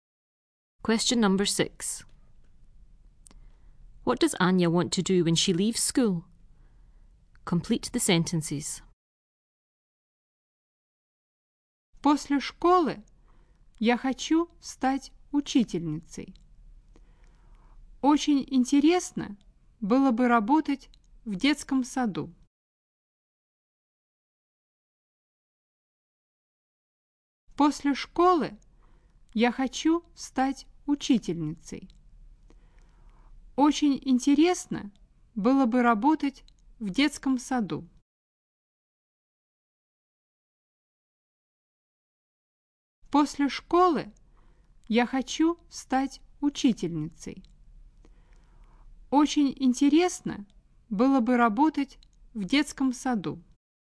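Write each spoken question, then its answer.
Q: What does Anya want to do when she leaves school?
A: Become a teacher; work in a kindergarten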